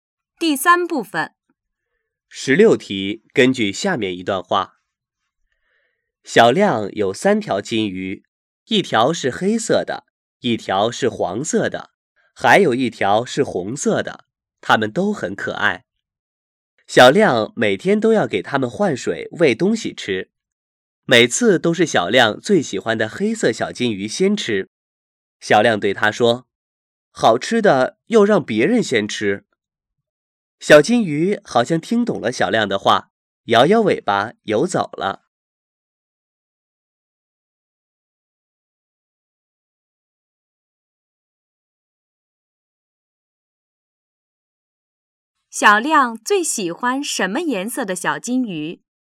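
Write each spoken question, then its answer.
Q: 小亮最喜欢什么颜色的小金鱼?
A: 黑色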